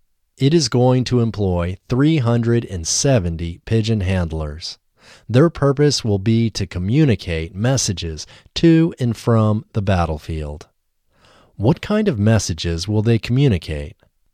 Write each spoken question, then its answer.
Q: What kind of messages will they communicate?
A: They will communicate messages to and from the battlefield.